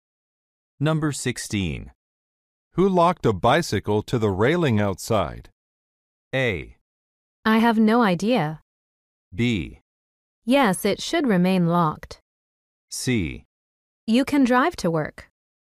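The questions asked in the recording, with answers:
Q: Who locked a bicycle to the railing outside?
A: A: I have no idea.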